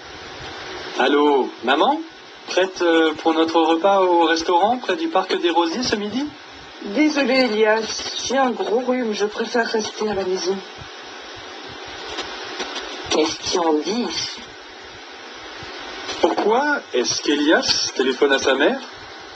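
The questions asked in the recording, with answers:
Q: Pourquoi est-ce qu'Elias téléphone à sa mère?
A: Pour confirmer leur repas au restaurant près du parc des Rosiers ce midi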